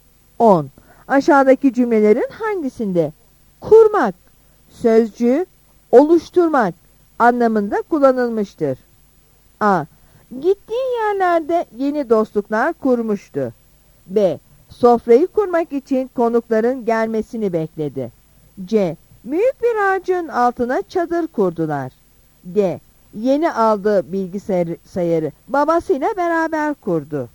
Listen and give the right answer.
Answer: Yanıt A'dır.